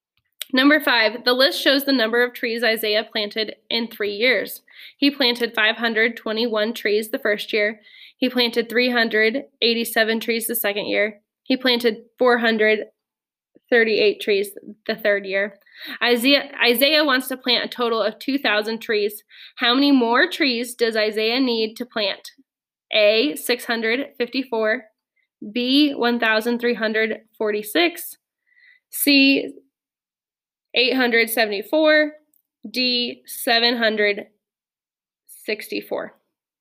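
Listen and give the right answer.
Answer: A: 654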